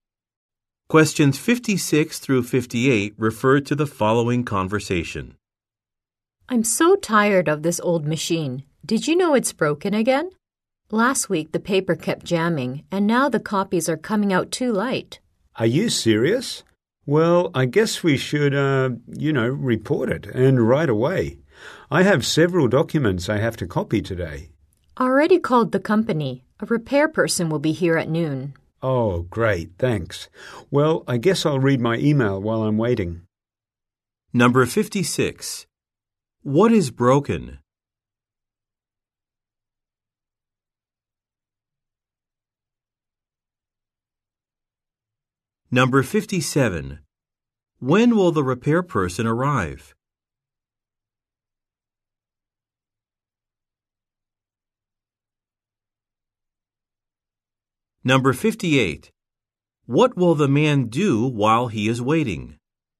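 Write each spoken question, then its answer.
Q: What is broken?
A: The copy machine

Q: When will the repair person arrive?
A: At noon

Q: What will the man do while he is waiting?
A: Read his email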